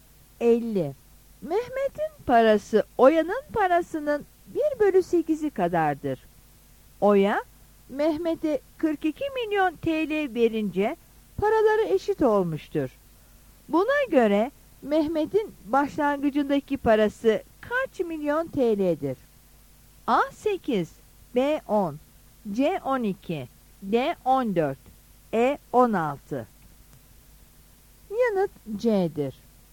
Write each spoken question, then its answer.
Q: Buna göre Mehmet'in başlangıcındaki parası kaç milyon TL'dir?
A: Yanıt C'dir.